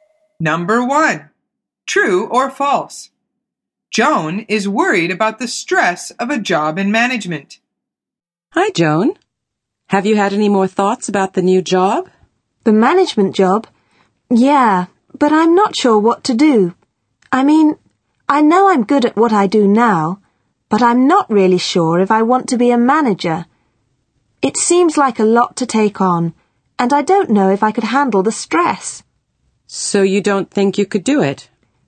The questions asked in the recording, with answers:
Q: Joan is worried about the stress of a job in management.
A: The answer is true. She says, I don't know if I could handle the stress.